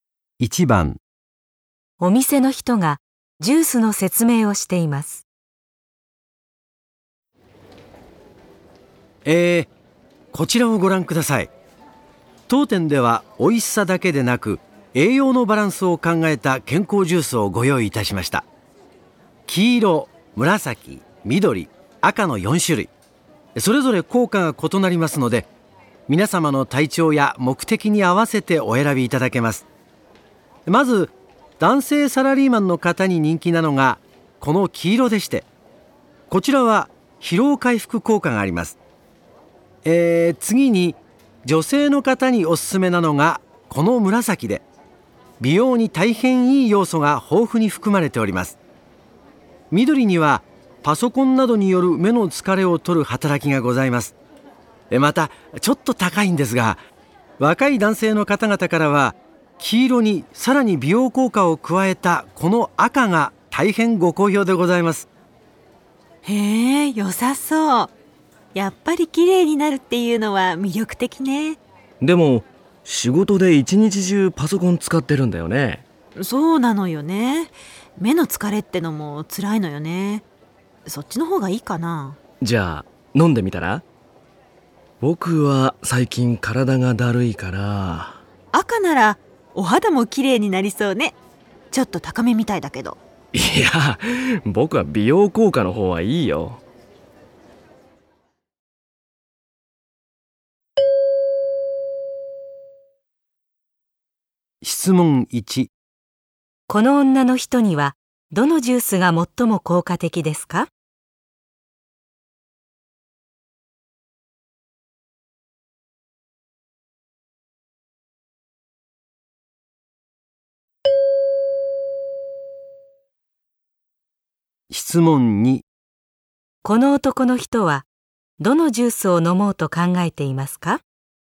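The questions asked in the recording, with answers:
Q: どのジュースを飲もうと考えていますか?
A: 黄色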